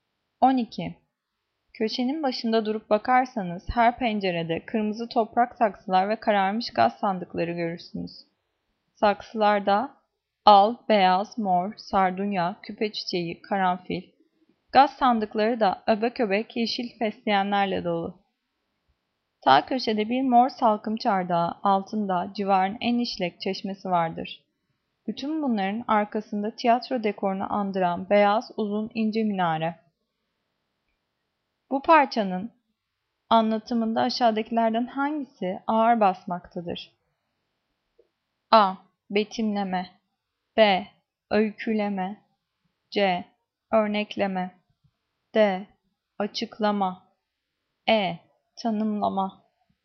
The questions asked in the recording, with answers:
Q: Bu parçanın anlatımında aşağıdakilerden hangisi ağır basmaktadır?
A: Cevap A. Betimleme.